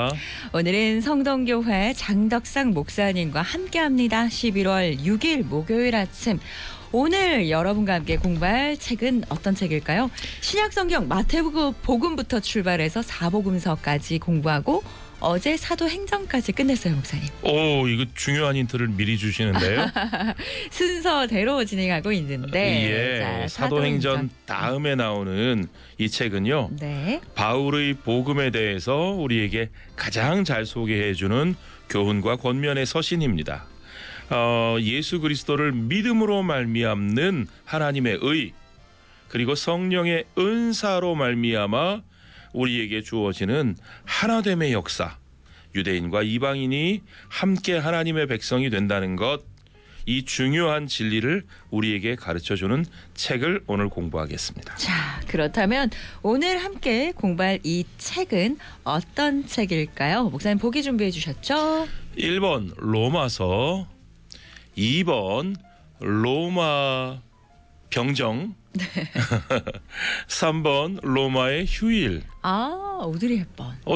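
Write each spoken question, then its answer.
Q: 자, 그렇다면 오늘 함께 공부할 이 책은 어떤 책일까요?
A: 1: 로마서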